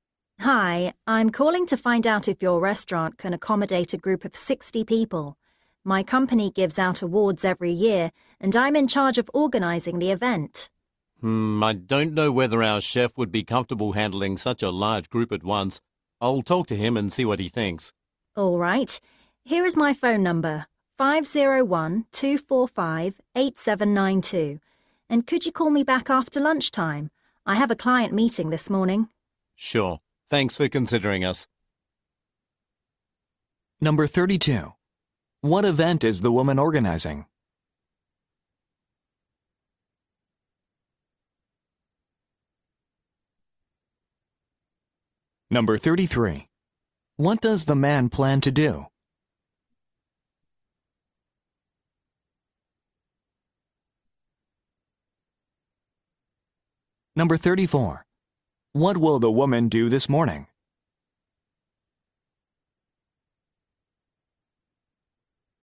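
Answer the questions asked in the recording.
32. A company awards event
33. Talk to the chef
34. Meet with a client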